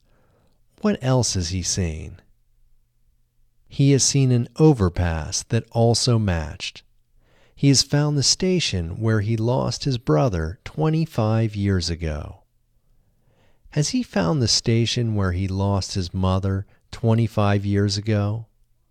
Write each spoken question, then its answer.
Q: Has he found the station where he lost his mother 25 years ago?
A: No, he hasn't found the station where he lost his mother 25 years ago.